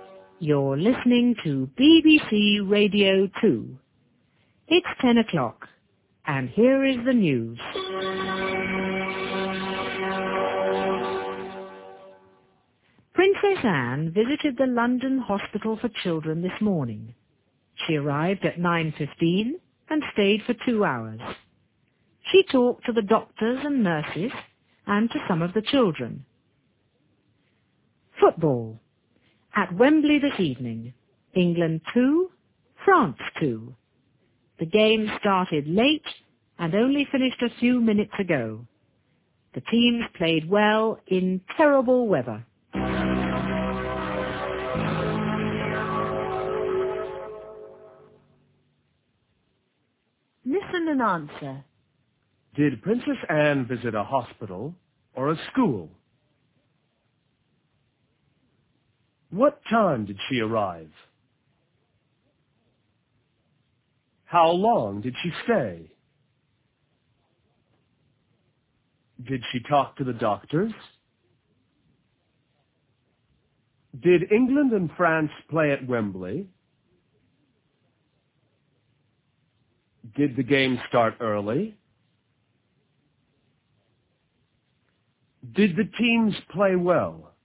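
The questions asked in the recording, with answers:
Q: Did Princess Anne visit a hospital or a school?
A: A hospital

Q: What time did she arrive?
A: At 9:15

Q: How long did she stay?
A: For 2 hours

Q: Did she talk to the doctors?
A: Yes, she did

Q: Did England and France play at Wembley?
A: Yes, they did

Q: Did the game start early?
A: No, it started late

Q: Did the teams play well?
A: Yes, they did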